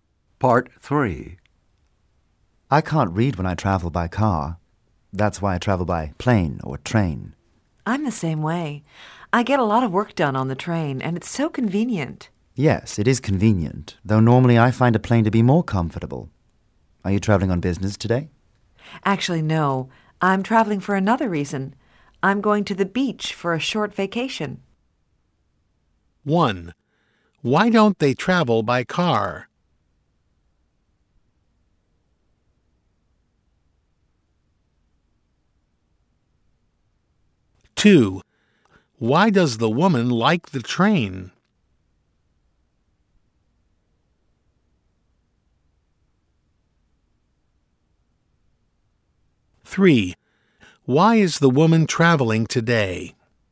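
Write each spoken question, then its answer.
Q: Why don't they travel by car?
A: They can't read when traveling by car.

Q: why does the woman like the train?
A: She gets a lot of work done and it's convenient.

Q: why is the woman traveling today?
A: She's going to the beach for a short vacation.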